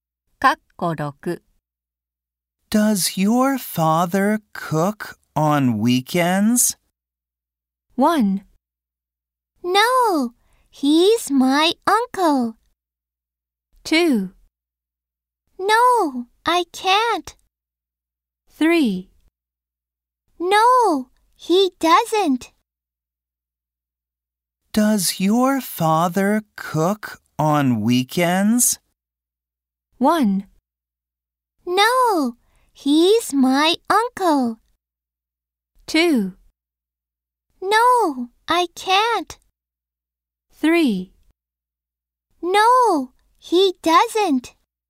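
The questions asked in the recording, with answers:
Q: Does your father cook on weekends?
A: 3: No, he doesn't.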